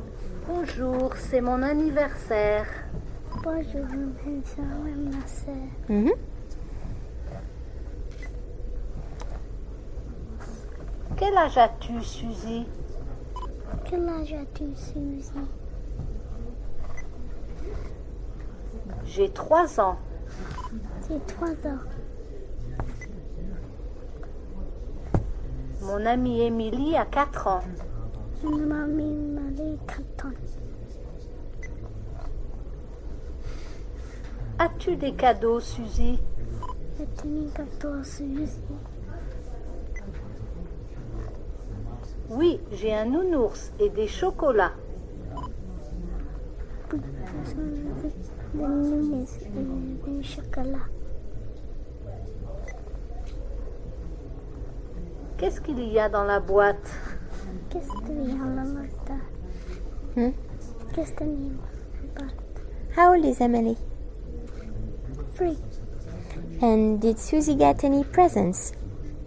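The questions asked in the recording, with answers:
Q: And did Susie get any presents?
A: Yes, a teddy bear and chocolates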